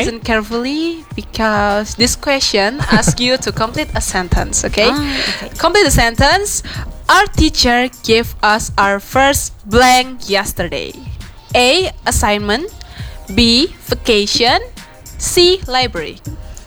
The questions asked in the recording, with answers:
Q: Complete the sentence. Our teacher gave us our first blank yesterday.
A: Okay, 1, 2, 3, A.